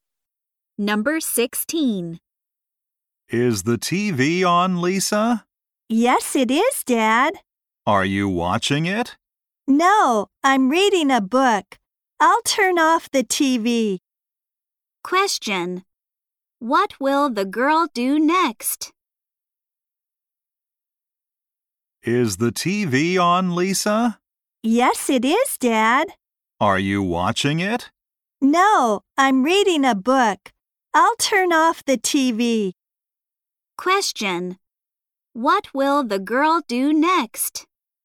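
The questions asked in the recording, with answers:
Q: What will the girl do next?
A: Turn off the TV.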